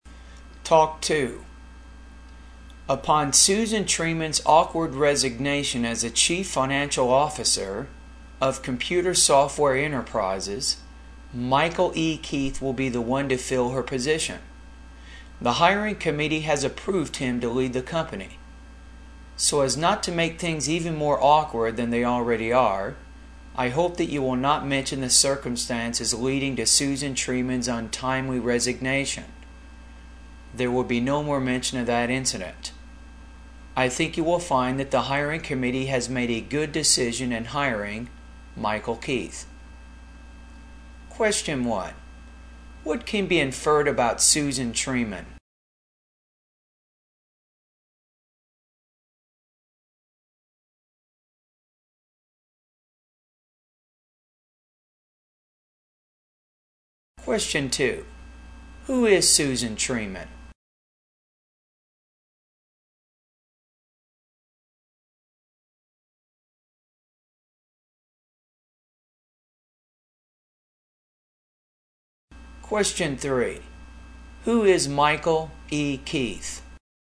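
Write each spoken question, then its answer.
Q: What can be inferred about Susan Treeman?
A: She resigned under awkward, embarrassing circumstances

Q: Who is Susan Treeman?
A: The former chief financial officer of Computer Software Enterprises

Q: Who is Michael E. Keith?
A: Susan Treeman's replacement as chief financial officer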